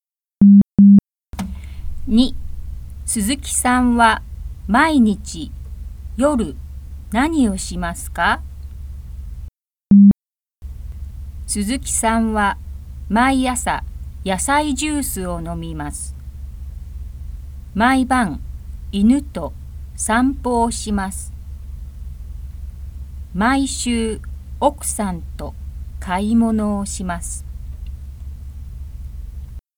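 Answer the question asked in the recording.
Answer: 犬と散歩をします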